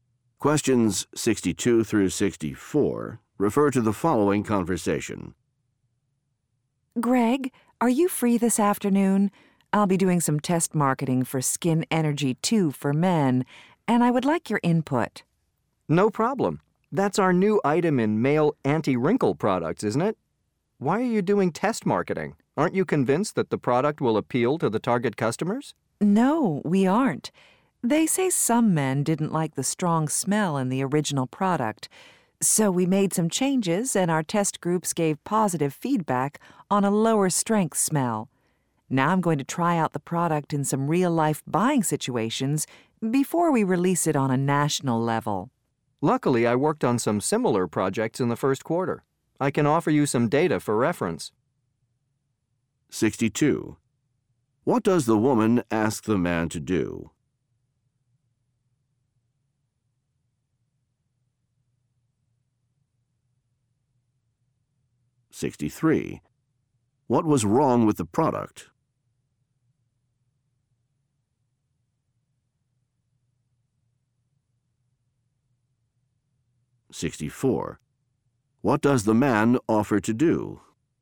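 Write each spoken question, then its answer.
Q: What does the woman ask the man to do?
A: Give input on test marketing

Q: What was wrong with the product?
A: Its smell was too strong

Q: What does the man offer to do?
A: Provide data from similar projects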